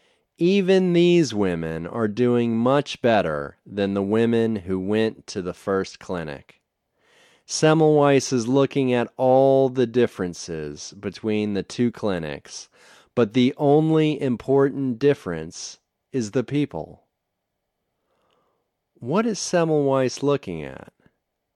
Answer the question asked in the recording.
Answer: He is looking at all the differences between the two clinics.